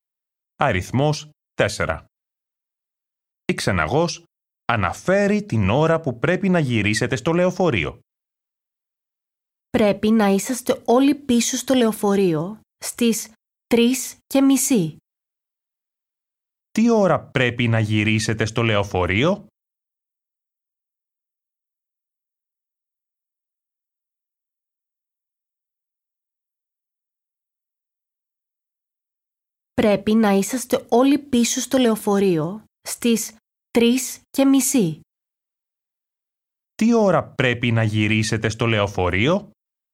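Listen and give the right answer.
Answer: στις 3:30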